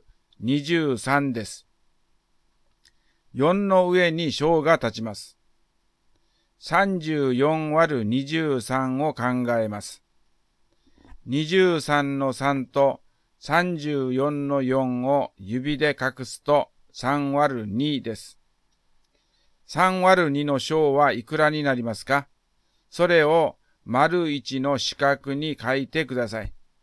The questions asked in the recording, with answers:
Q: 3÷2 の小はいくらになりますか?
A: 3÷2は1ですね。